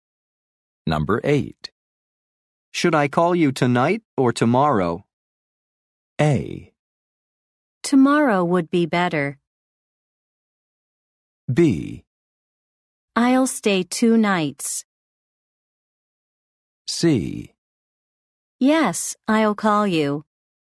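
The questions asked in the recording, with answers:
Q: Should I call you tonight or tomorrow?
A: A: Tomorrow would be better.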